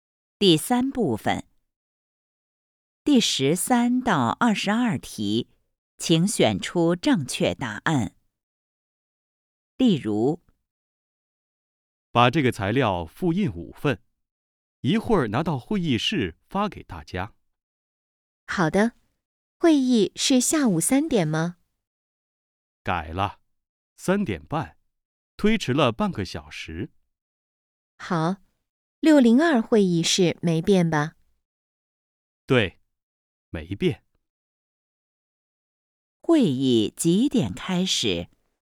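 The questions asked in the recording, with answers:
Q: 会议几点开始?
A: 三点半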